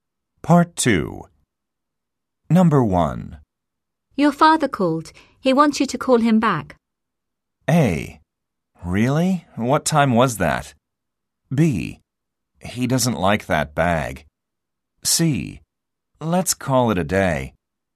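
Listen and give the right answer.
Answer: A: Really? What time was that?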